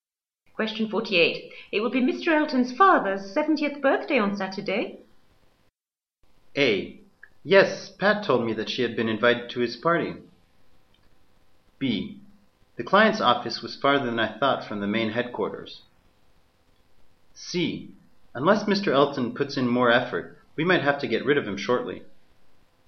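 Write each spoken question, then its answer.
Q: Elton's father's 70th birthday on Saturday.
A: A: Yes, Pat told me that she had been invited to his party.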